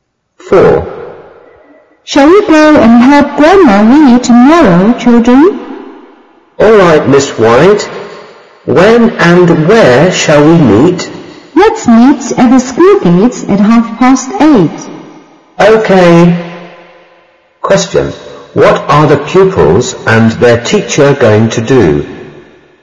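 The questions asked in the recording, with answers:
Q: What are the pupils and their teacher going to do?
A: Help Grandma Lee tomorrow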